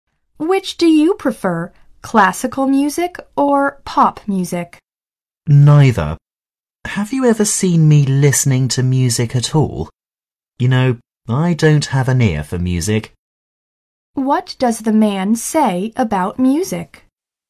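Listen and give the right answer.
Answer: He doesn't have an ear for music and doesn't listen to it.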